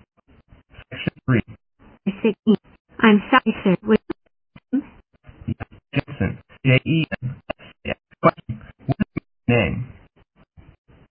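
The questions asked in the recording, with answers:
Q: What is your name?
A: Jensen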